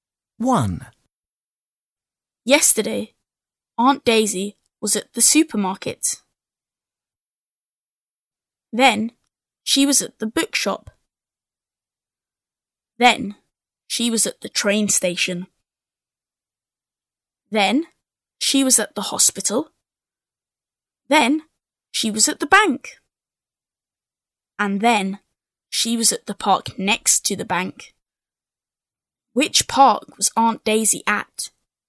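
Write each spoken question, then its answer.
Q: Which park was Aunt Daisy at?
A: the park next to the bank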